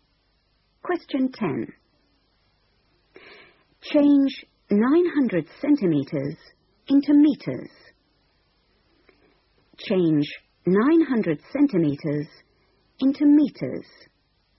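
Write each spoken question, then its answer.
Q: Change 900 centimeters into meters.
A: 9 meters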